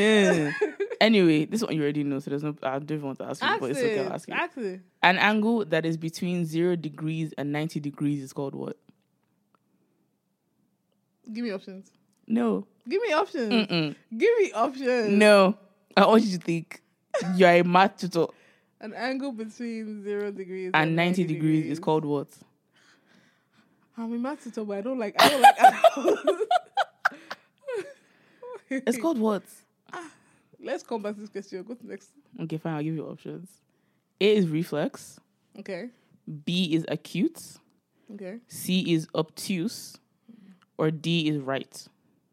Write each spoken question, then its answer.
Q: An angle that is between zero degrees and ninety degrees is called what?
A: So it's an acute angle.